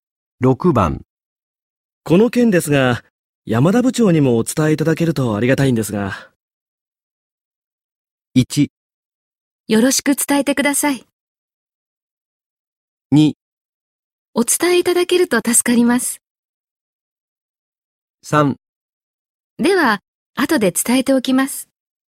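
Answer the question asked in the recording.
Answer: 3: では、後で伝えておきます。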